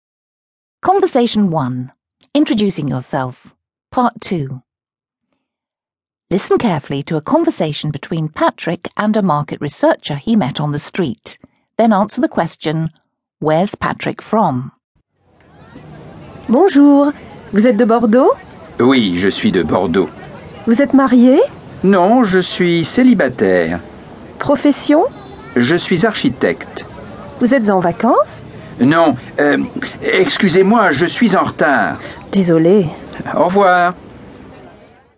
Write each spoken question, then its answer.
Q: where's Patrick from?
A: That's right, he's from Bordeaux.